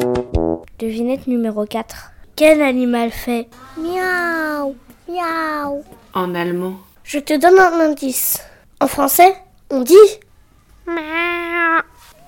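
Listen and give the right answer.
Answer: le chat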